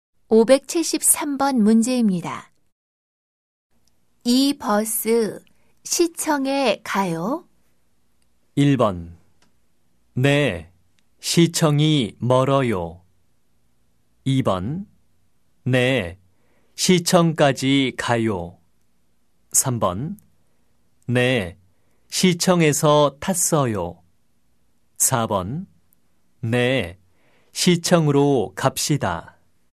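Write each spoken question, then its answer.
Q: 이 버스 시청에 가요?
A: 2: 네, 시청까지 가요.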